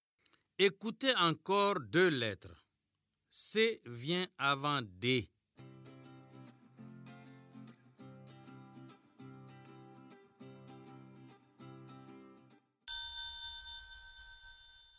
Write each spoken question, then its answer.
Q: C vient avant D.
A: Monsieur, je me suis levé.